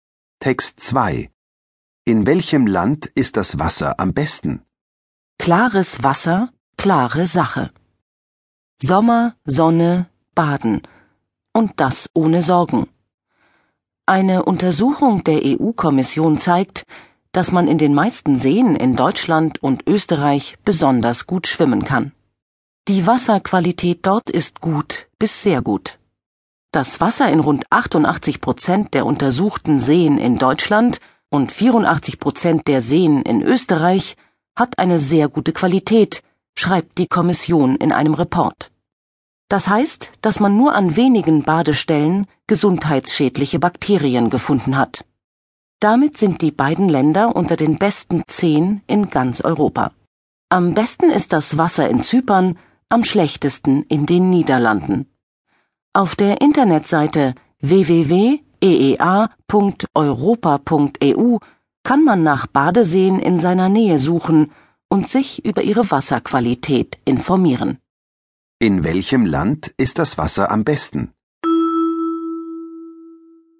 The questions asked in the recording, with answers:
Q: In welchem Land ist das Wasser am besten?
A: In Zypern.